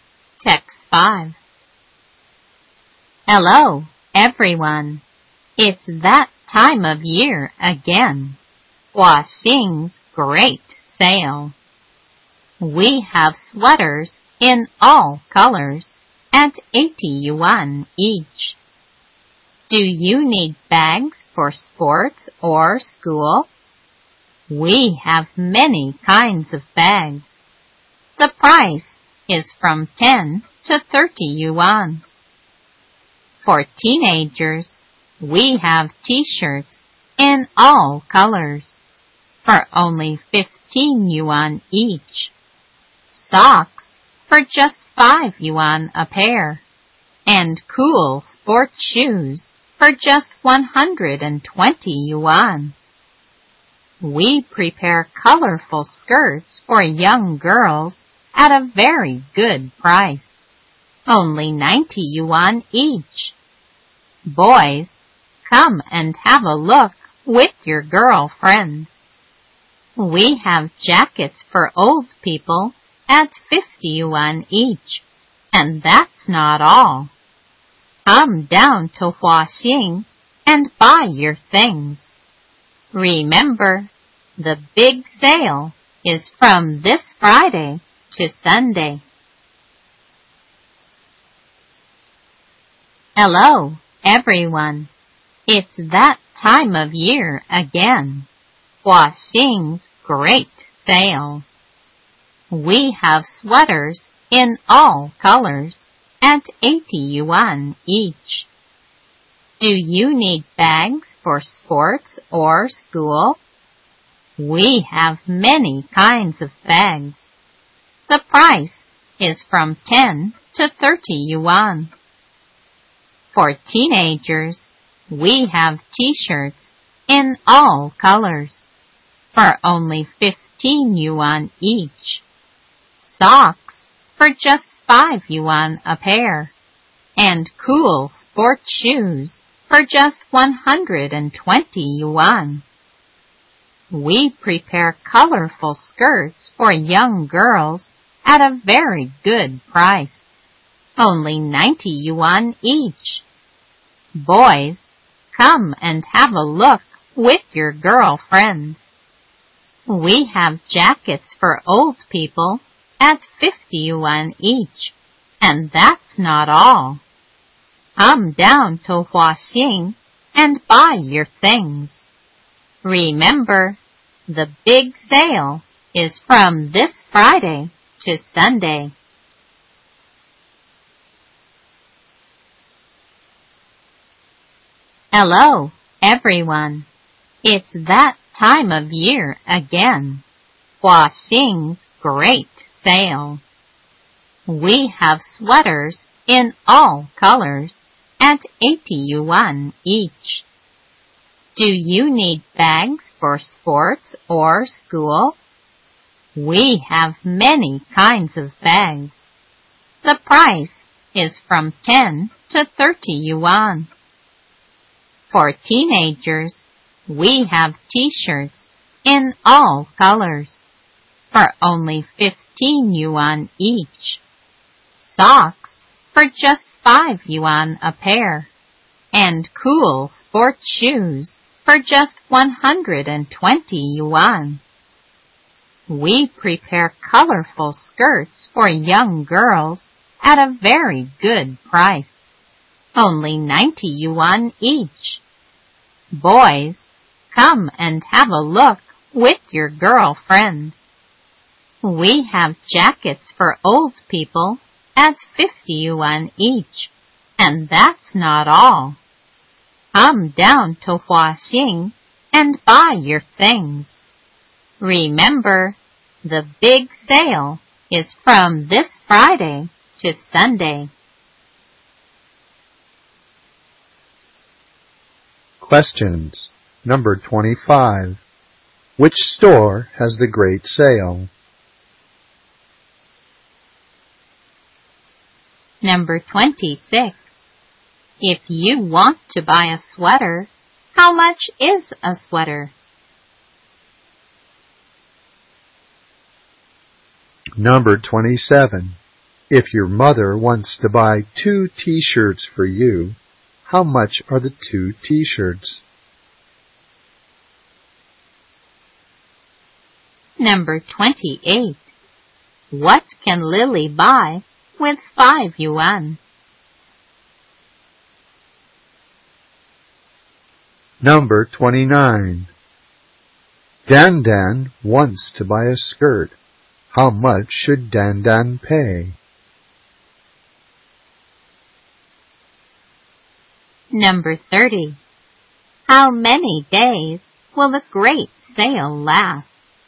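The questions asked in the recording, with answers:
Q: Which store has the great sale?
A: Huaxing

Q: If you want to buy a sweater, how much is a sweater?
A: 80 yuan

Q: If your mother wants to buy 2 t-shirts for you, how much are the 2 t-shirts?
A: 30 yuan

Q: What can Lily buy with 5 yuan?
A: A pair of socks

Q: How much should Dandan pay?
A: 90 yuan

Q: How many days will the great sale last?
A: Three days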